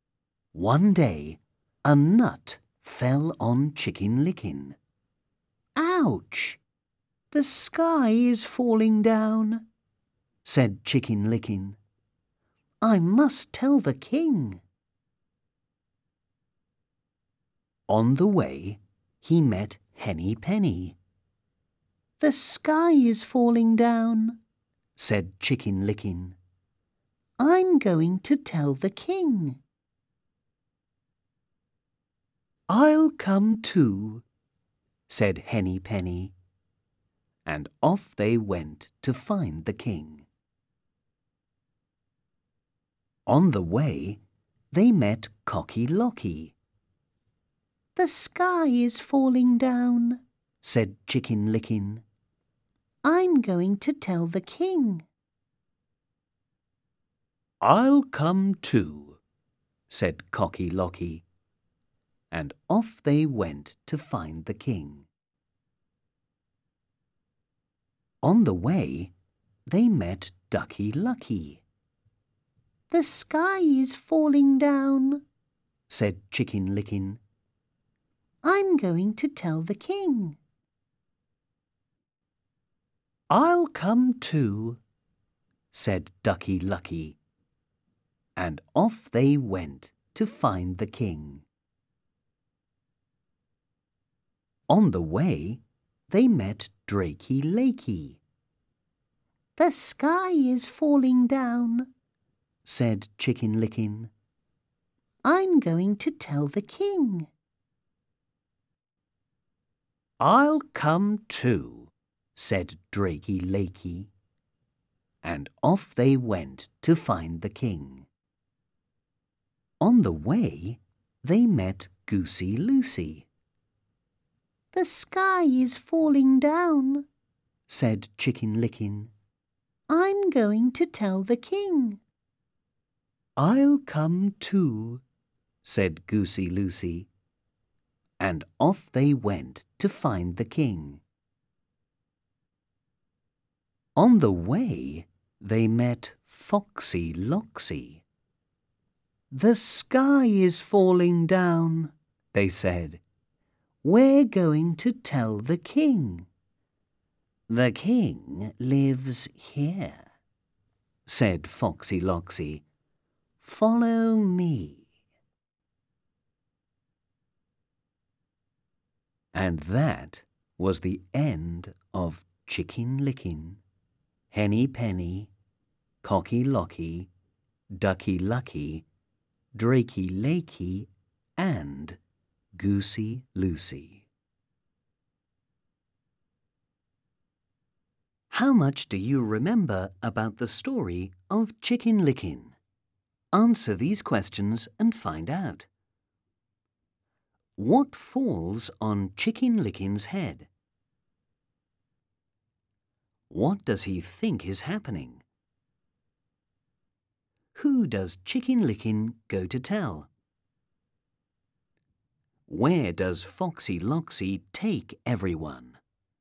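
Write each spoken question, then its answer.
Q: What falls on Chicken Licking's head?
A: A nut

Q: What does he think is happening?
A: The sky is falling down

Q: Who does Chicken Licking go to tell?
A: The king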